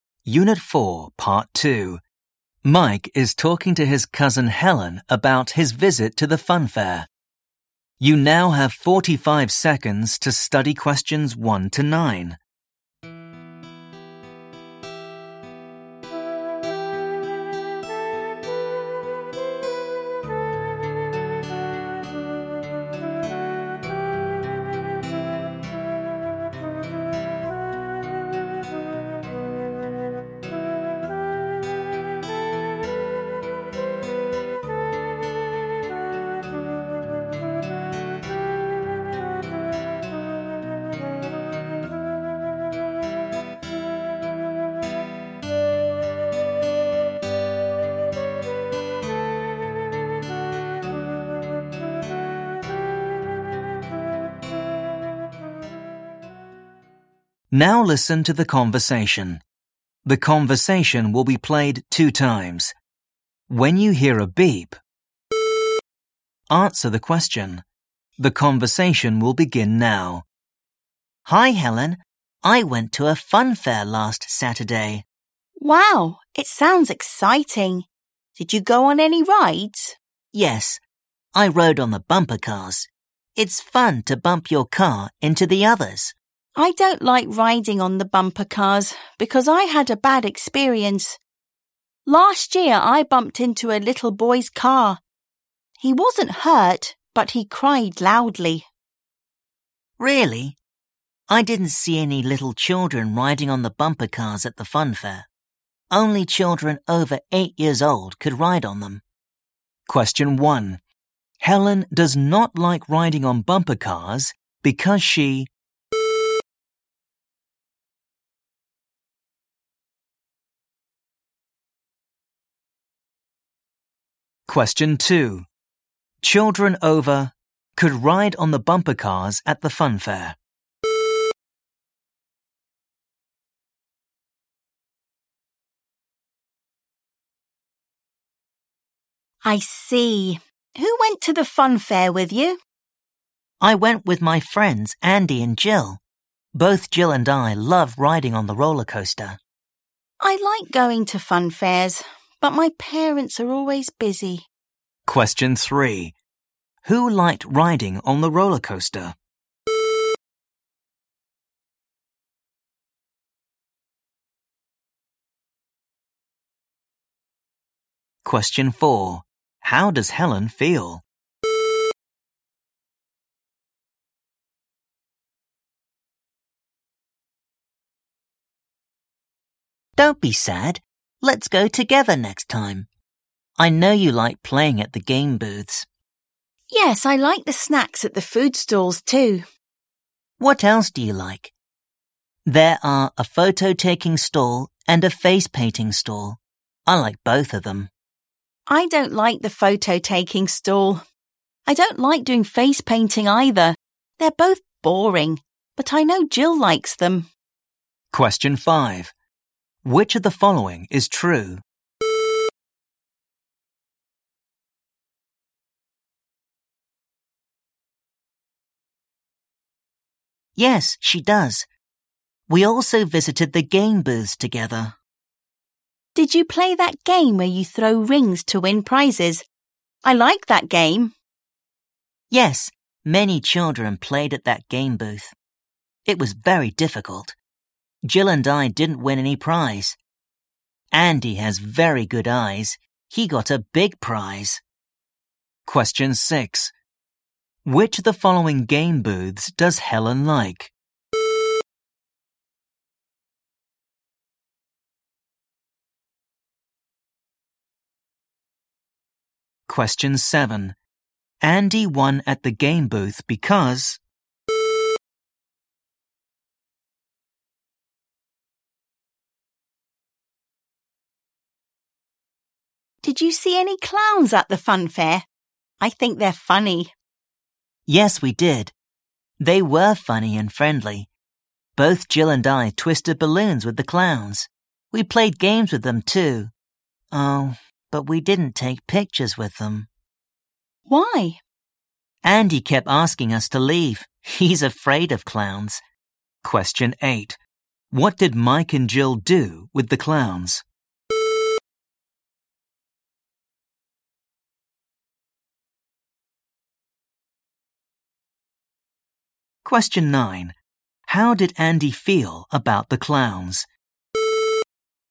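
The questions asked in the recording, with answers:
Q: Helen does not like riding on bumper cars because she...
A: bumped into a little boy's car last year and he cried loudly

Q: Children over could ride on the bumper cars at the fun fair.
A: 8 years old

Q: Who liked riding on the roller coaster?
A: Mike and Jill

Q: How does Helen feel?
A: sad

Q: Andy won at the game booth because...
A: he has very good eyes

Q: What did Mike and Jill do with the clowns?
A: They twisted balloons and played games with them

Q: How did Andy feel about the clowns?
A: He was afraid of them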